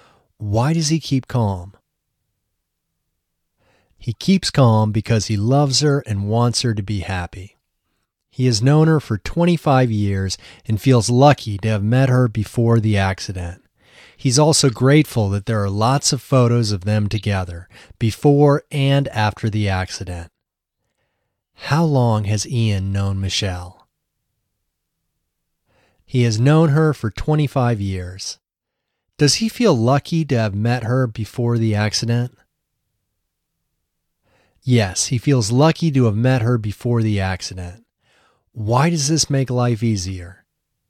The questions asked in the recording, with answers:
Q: How long has Ian known Michelle?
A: He has known her for 25 years.